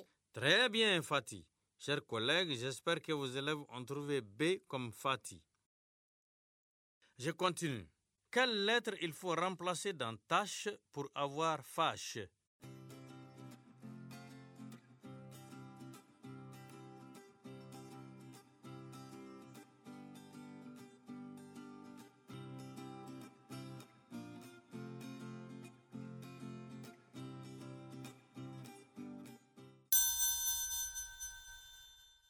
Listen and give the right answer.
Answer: Monsieur, c'est la lettre T.